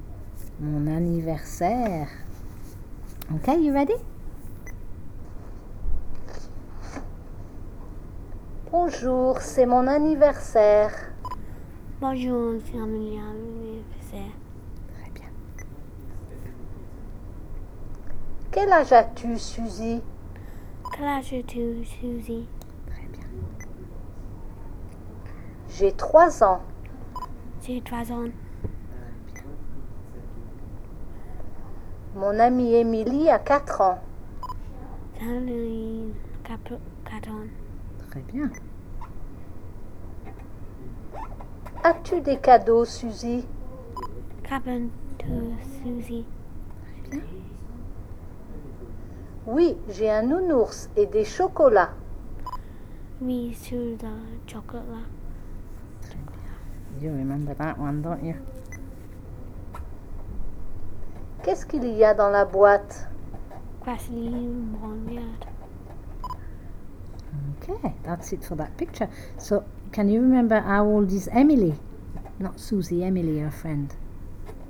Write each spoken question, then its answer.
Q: So, can you remember how old is Emily?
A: mon amie Emily a 4 ans.